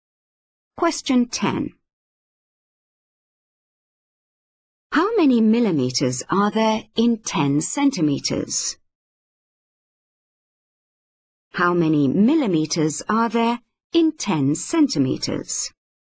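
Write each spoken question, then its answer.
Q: How many millimeters are there in 10 centimeters?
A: 100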